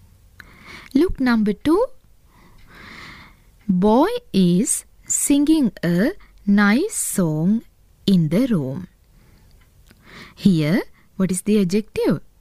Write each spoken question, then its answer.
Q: Here, what is the adjective?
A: Yes, the adjective is nice.